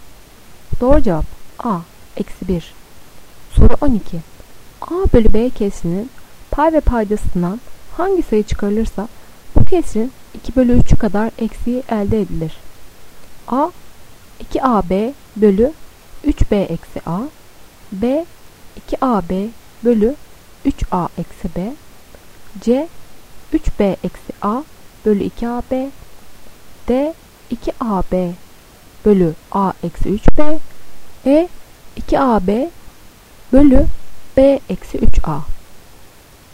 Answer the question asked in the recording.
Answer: Doğru cevap A 2AB bölü 3B eksi A.